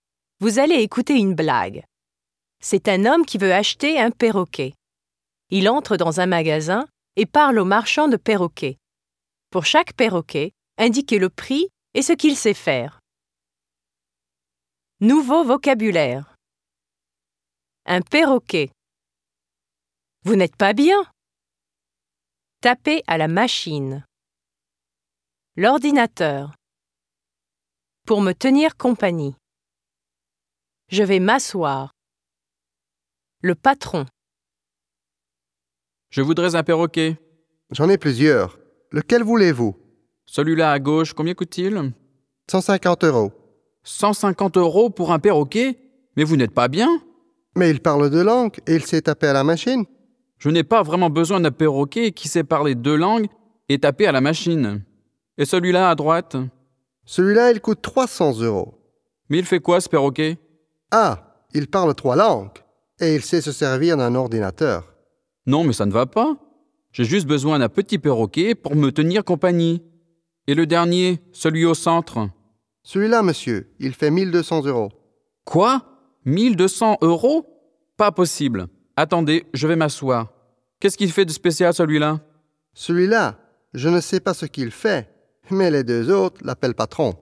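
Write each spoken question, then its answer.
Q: Pour chaque perroquet, indiquez le prix et ce qu'il sait faire.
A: À gauche : 150 euros, il parle deux langues et sait taper à la machine ; à droite : 300 euros, il parle trois langues et sait se servir d'un ordinateur ; au centre : 1200 euros, on ne sait pas ce qu'il fait (les deux autres l'appellent patron)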